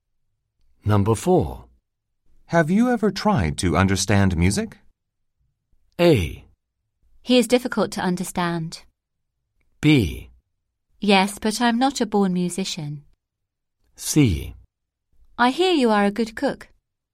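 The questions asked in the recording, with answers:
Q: Have you ever tried to understand music?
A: B: Yes, but I'm not a born musician.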